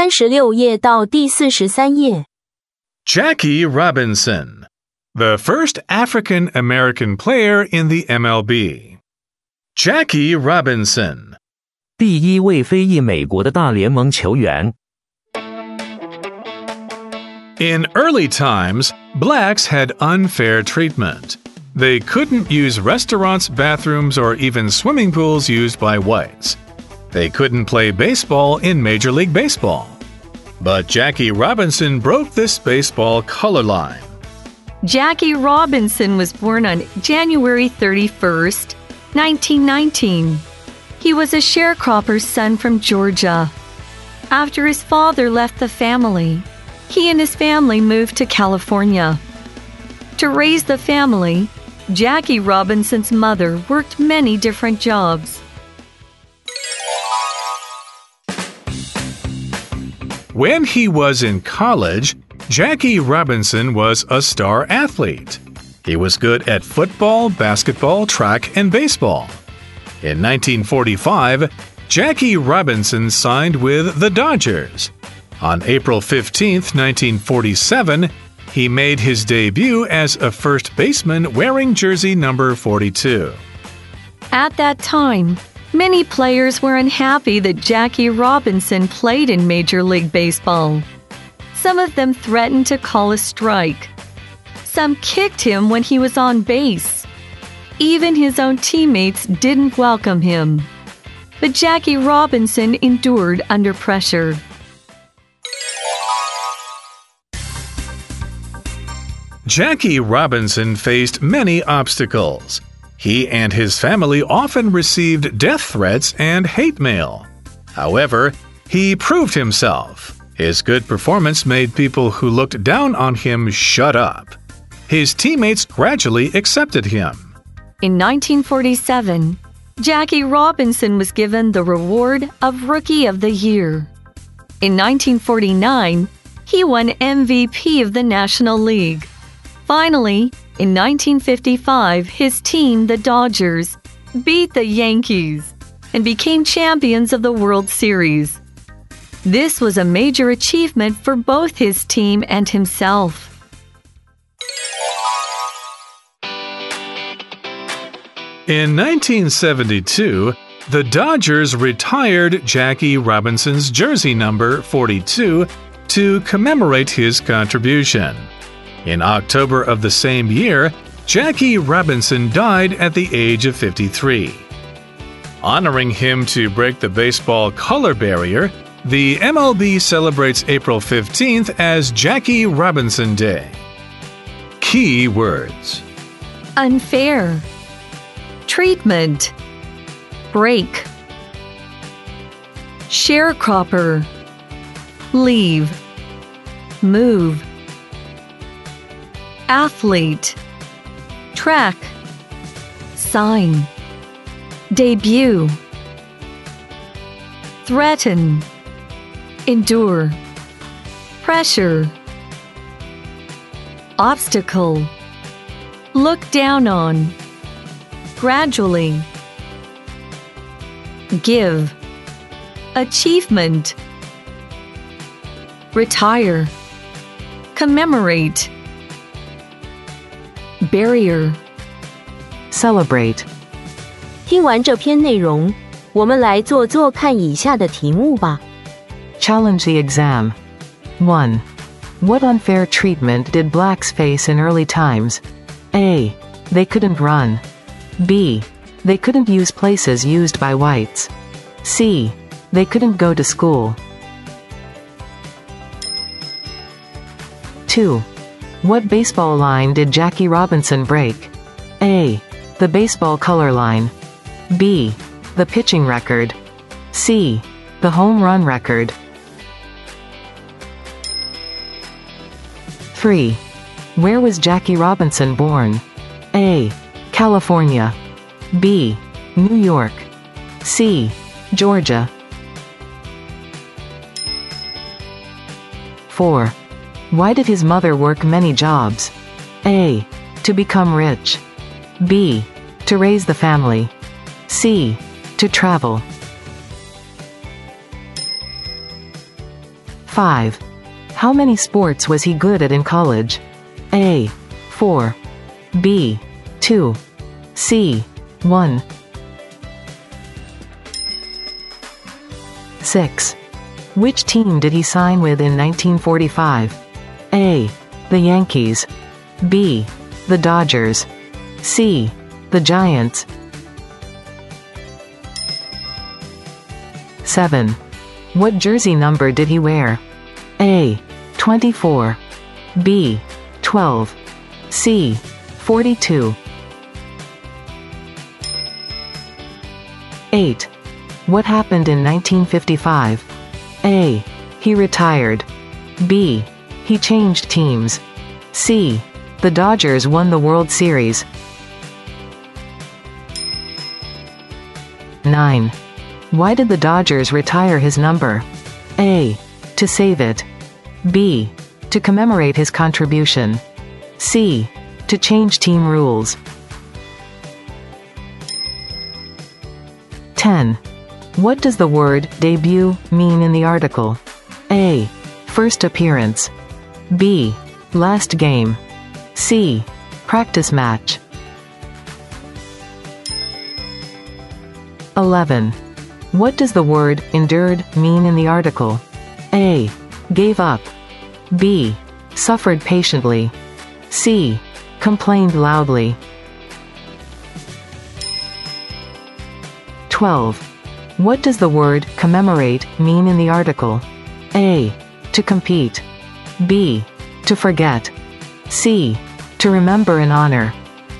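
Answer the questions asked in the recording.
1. B: They couldn't use places used by whites.
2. A: The baseball color line.
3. C: Georgia.
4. B: To raise the family.
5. A: 4.
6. B: The Dodgers.
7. C: 42.
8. C: The Dodgers won the World Series.
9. B: To commemorate his contribution.
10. A: First appearance.
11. B: Suffered patiently.
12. C: To remember and honor.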